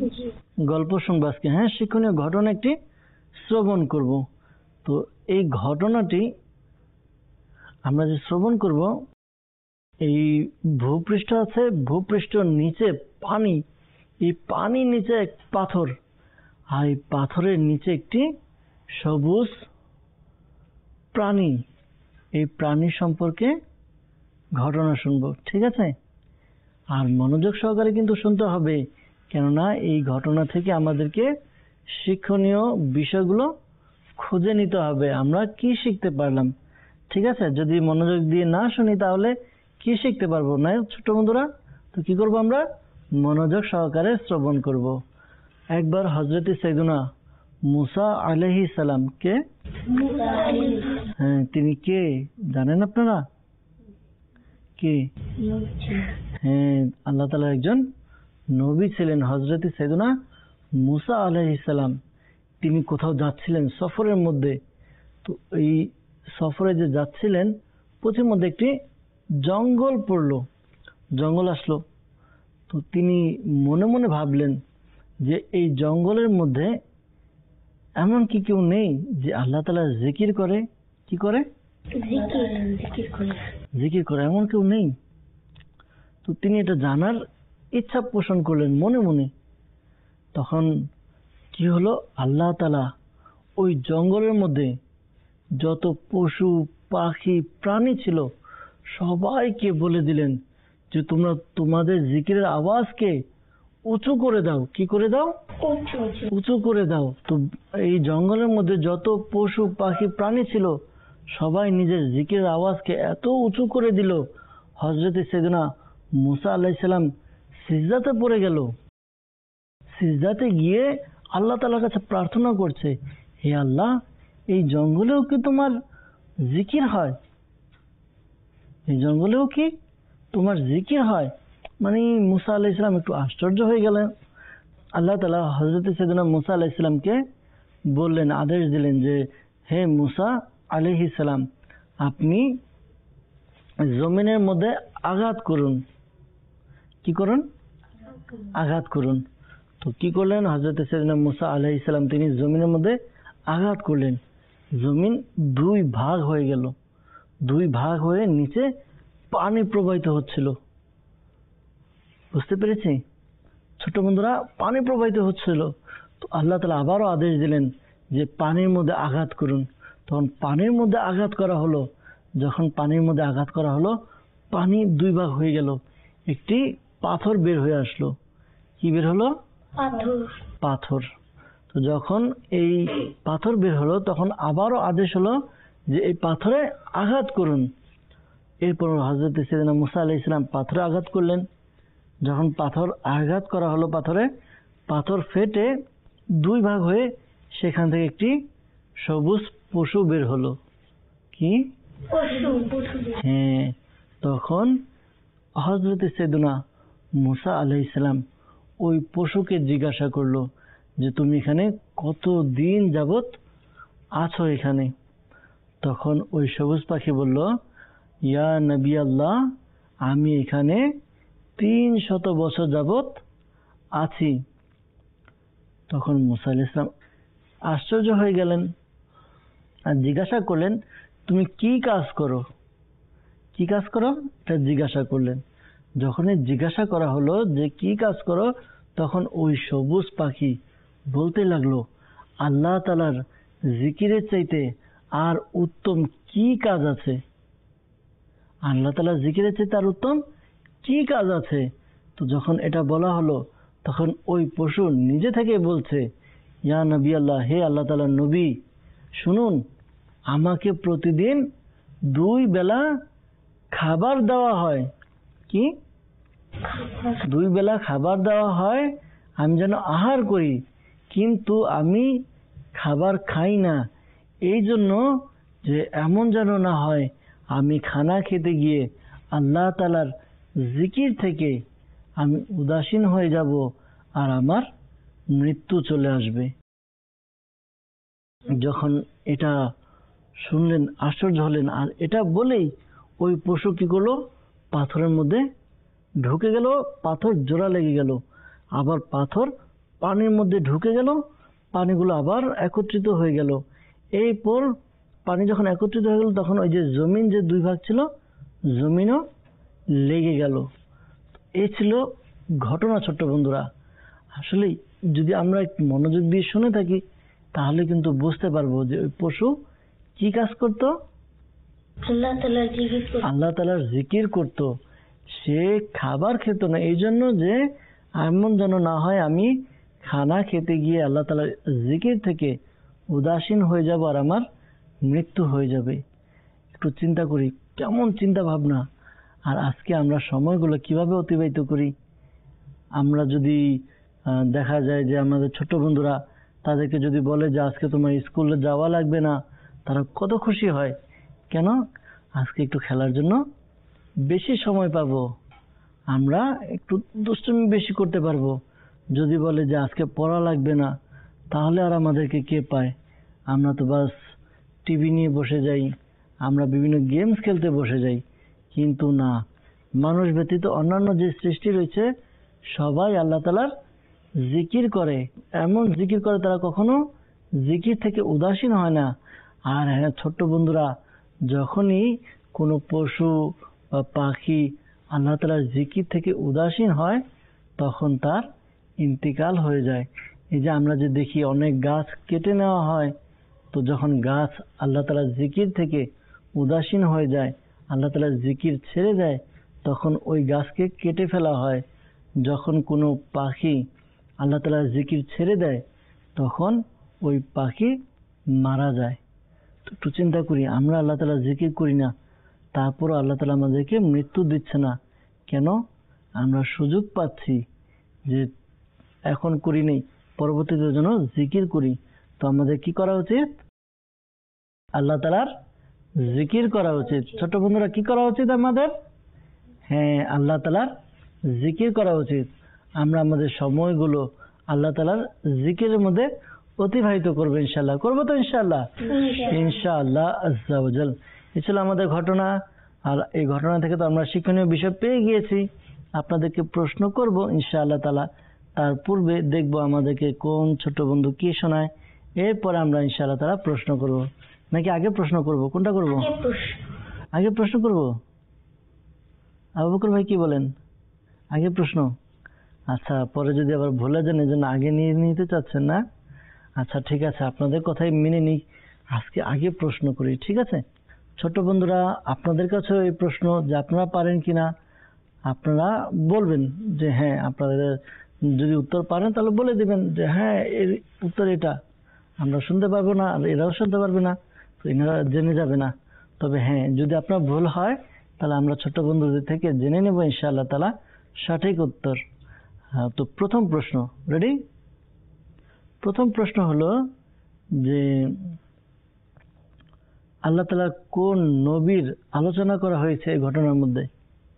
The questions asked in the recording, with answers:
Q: প্রথম প্রশ্ন হলো যে আল্লাহ তাআলা কোন নবীর আলোচনা করা হয়েছে এই ঘটনার মধ্যে?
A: হযরত মূসা আলাইহিস সালামের।